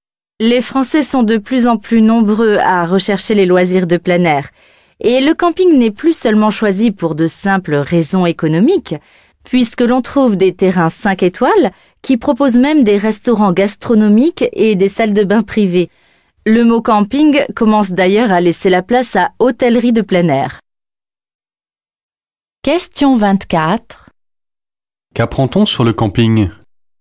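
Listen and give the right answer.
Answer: Il n'est plus choisi seulement pour des raisons économiques; il devient haut de gamme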